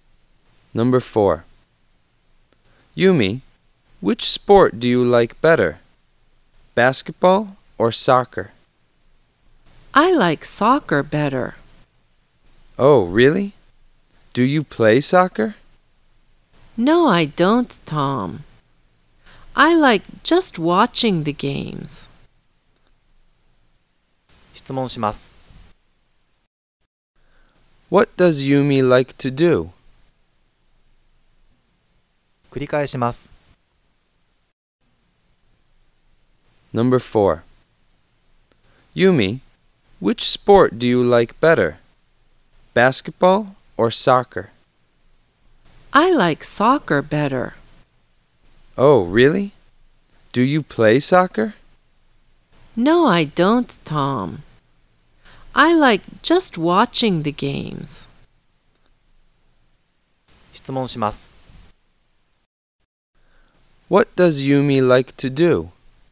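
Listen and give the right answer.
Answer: Watching soccer games.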